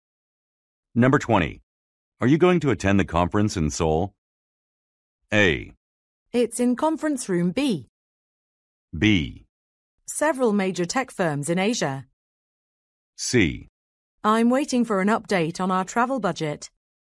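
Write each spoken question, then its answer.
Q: Are you going to attend the conference in Seoul?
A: C: I'm waiting for an update on our travel budget.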